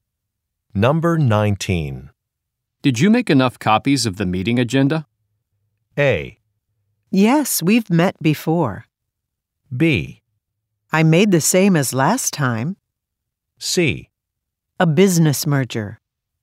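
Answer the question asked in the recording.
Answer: B: I made the same as last time.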